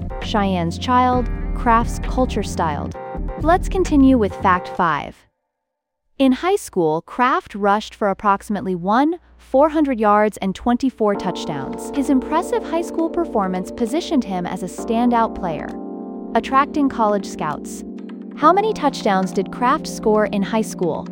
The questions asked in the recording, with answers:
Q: How many touchdowns did Kraft score in high school?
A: 24.